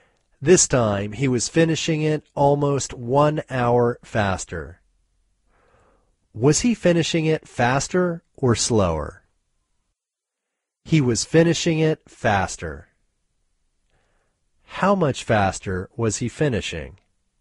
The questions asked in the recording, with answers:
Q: How much faster was he finishing?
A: He was finishing almost 1 hour faster.